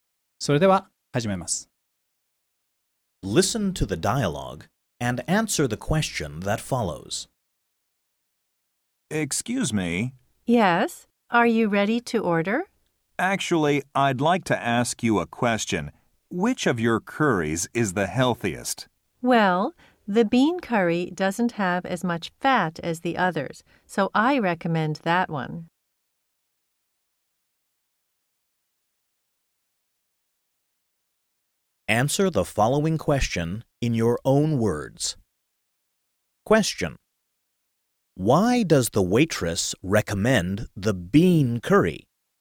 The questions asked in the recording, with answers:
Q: Why does the waitress recommend the bean curry?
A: Because it doesn't have as much fat as the others.